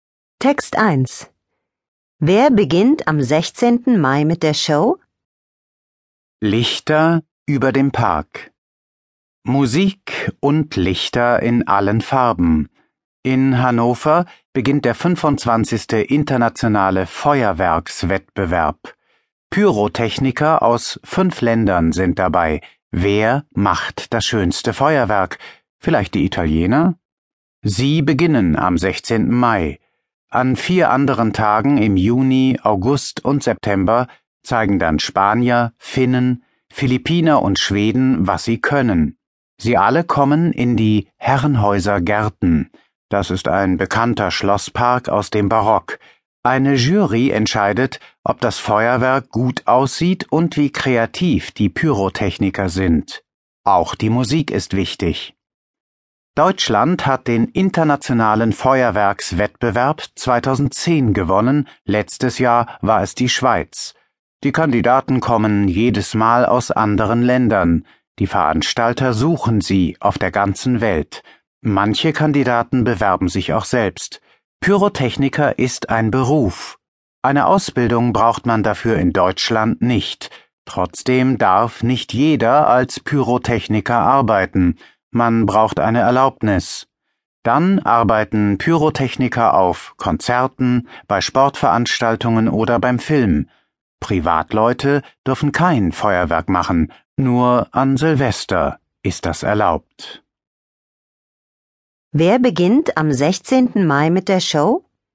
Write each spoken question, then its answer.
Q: Wer beginnt am 16. Mai mit der Show?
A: Die Italiener beginnen mit dem Feuerwerk.